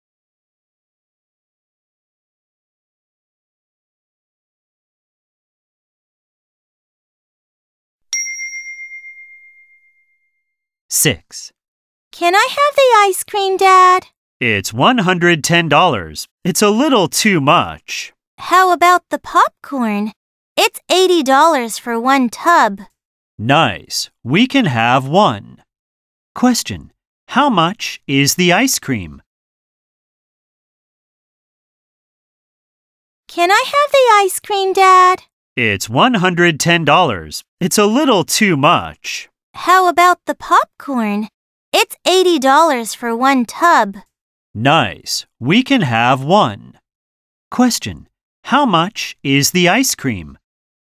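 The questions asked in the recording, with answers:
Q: How much is the ice cream?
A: $110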